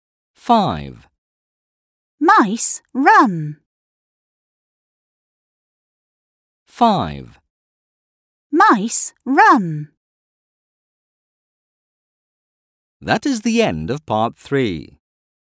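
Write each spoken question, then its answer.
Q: Mice run.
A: yes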